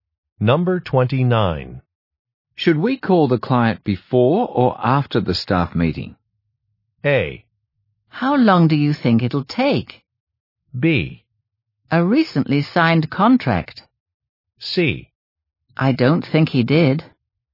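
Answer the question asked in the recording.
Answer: A: How long do you think it'll take?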